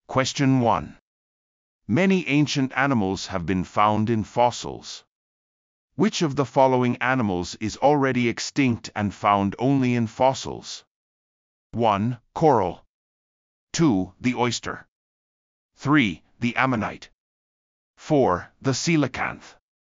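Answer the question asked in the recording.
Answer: 3: The ammonite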